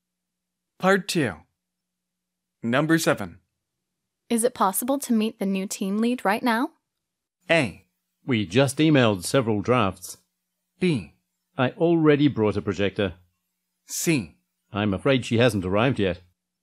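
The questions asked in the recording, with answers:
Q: Is it possible to meet the new team lead right now?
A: C: I'm afraid she hasn't arrived yet.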